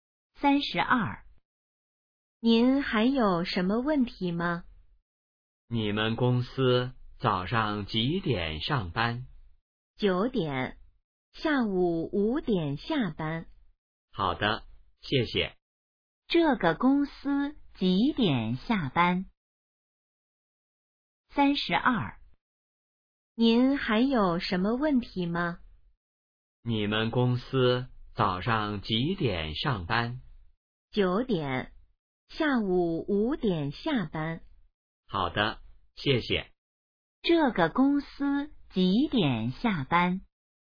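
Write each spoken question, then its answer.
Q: 这个公司几点下班?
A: 下午5点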